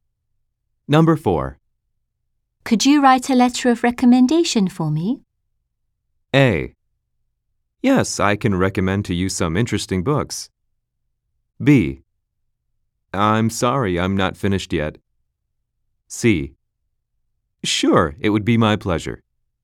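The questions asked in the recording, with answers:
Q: Could you write a letter of recommendation for me?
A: C: Sure, it would be my pleasure.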